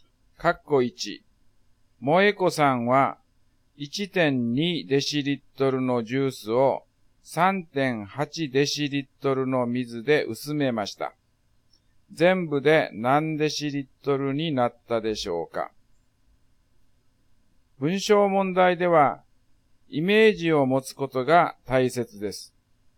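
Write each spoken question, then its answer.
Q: 全部で何デシリットルになったでしょうか?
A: 5デシリットル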